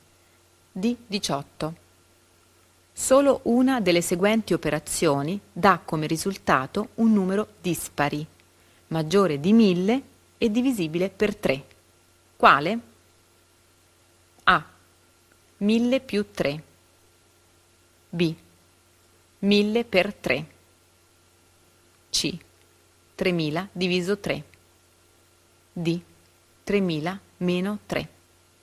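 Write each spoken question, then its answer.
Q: Quale?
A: D: 3000 meno 3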